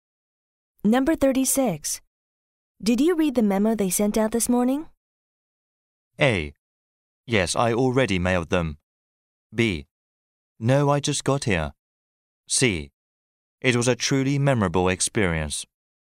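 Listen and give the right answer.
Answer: B: No, I just got here.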